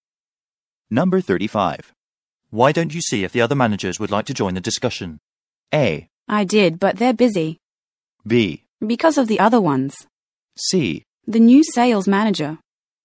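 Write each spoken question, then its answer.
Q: Why don't you see if the other managers would like to join the discussion?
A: A: I did, but they're busy.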